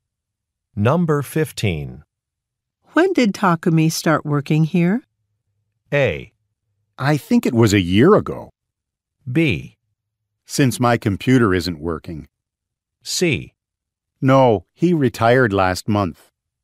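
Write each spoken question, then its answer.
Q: When did Takumi start working here?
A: A: I think it was a year ago.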